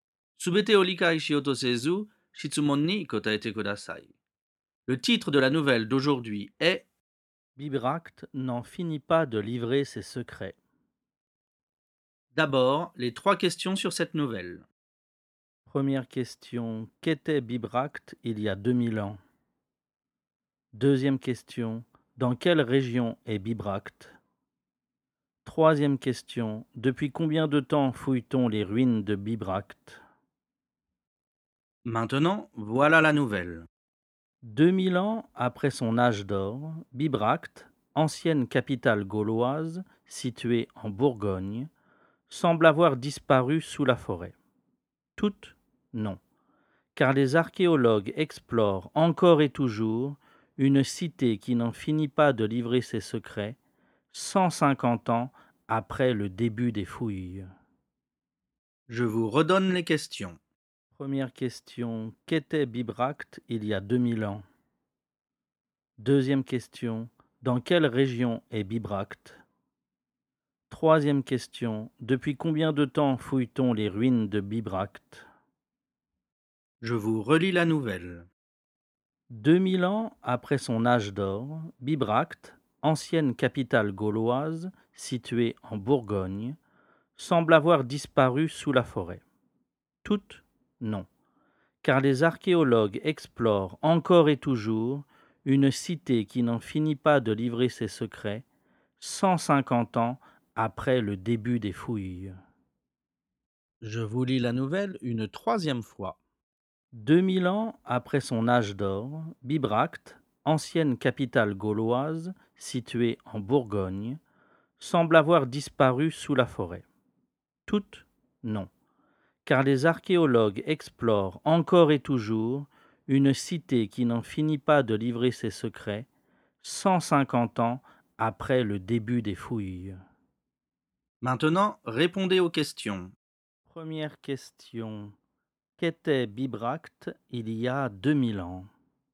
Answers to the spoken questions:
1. Bibracte était une capitale gauloise il y a 2000 ans.
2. Bibracte est en Bourgogne.
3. On fouille les ruines de Bibracte depuis 150 ans.